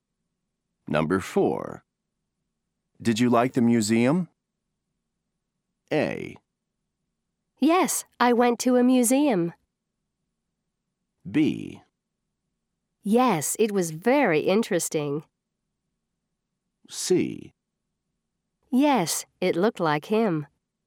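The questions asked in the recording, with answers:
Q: Did you like the museum?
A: B: Yes, it was very interesting.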